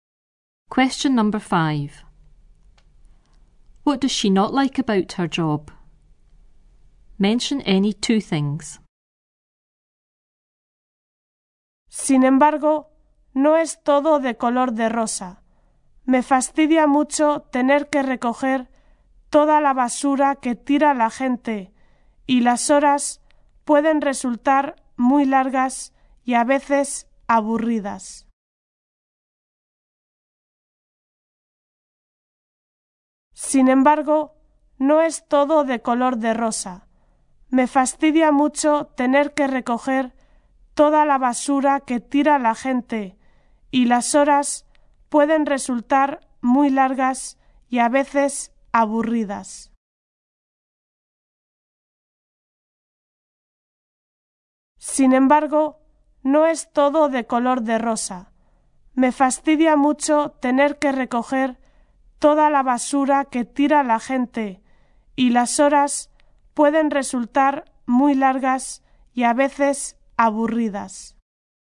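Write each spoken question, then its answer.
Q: What does she not like about her job?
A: Picking up rubbish people leave; long, sometimes boring hours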